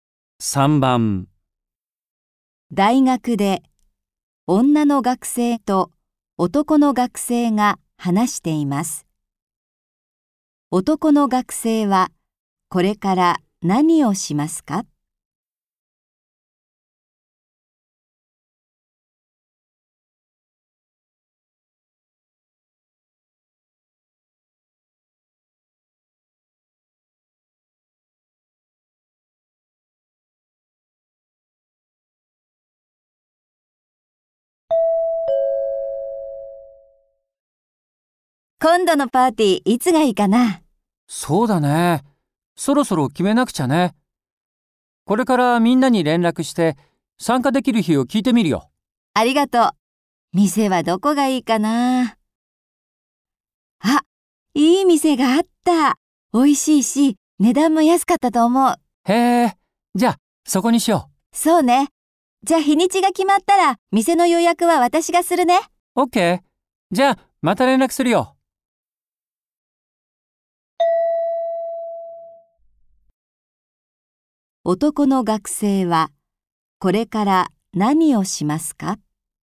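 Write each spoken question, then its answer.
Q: 男の学生はこれから何をしますか?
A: みんなに連絡して参加できる日を聞く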